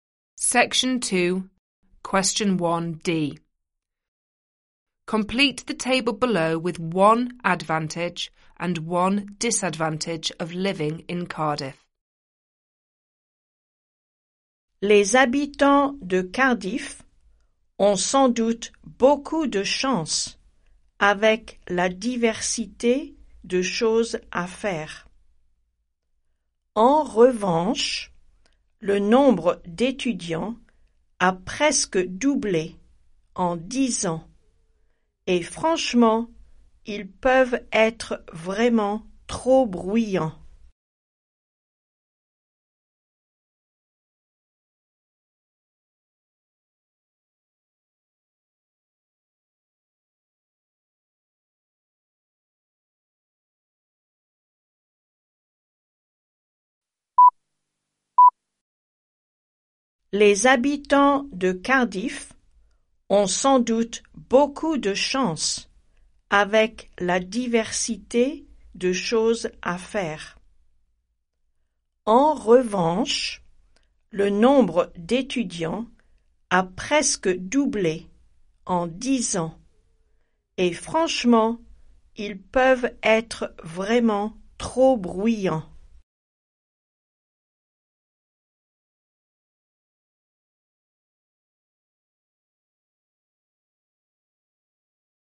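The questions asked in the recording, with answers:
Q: Complete the table below with one advantage and one disadvantage of living in Cardiff.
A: Advantage: a variety of things to do; disadvantage: the number of students has almost doubled and they can be too noisy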